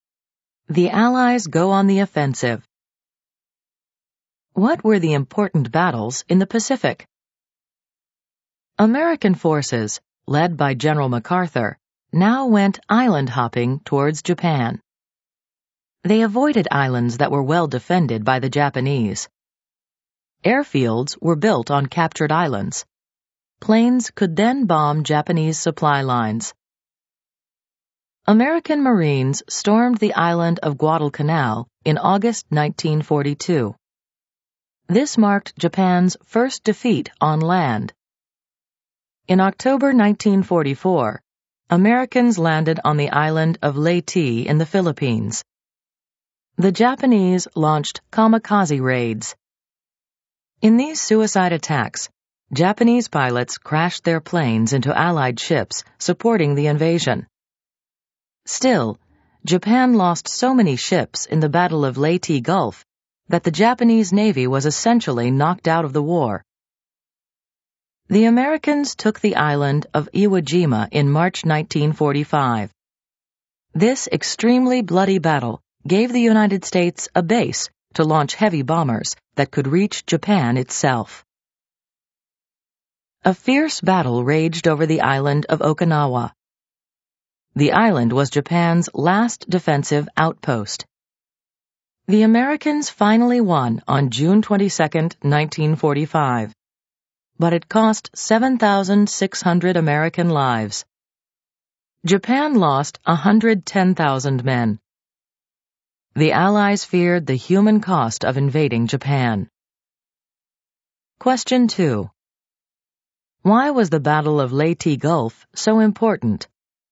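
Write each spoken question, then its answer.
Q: Why was the Battle of Leyte Gulf so important?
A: Japan lost so many ships that its navy was essentially knocked out of the war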